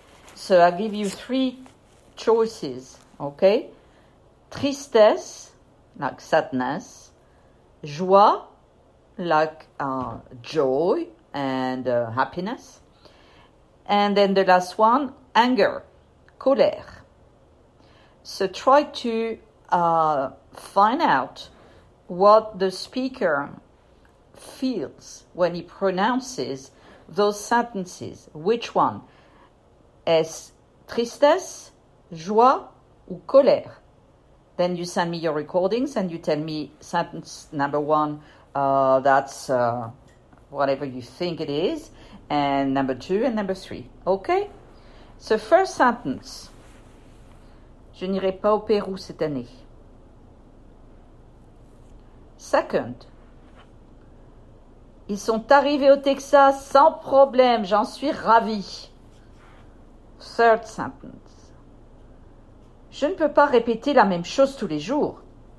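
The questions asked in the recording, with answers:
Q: ils sont arrivés au Texas sans problème, j'en suis ravi.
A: joie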